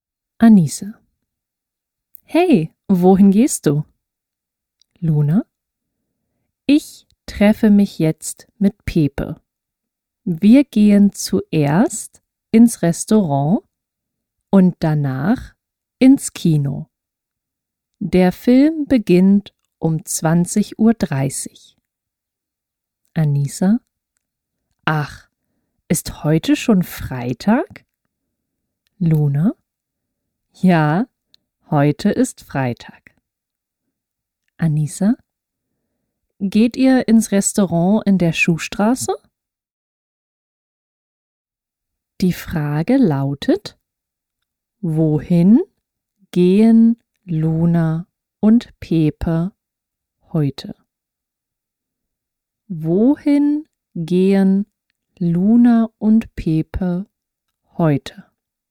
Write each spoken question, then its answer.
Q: Wohin gehen Luna und Pepe heute?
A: Sie gehen ins Restaurant und ins Kino.